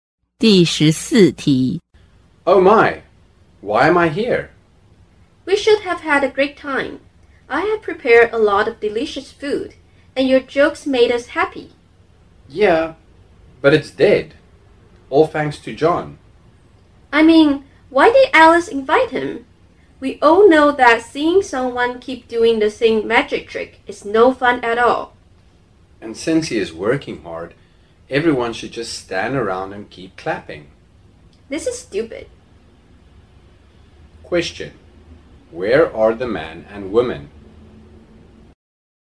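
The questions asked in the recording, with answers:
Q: Question. Where are the man and woman?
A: At a party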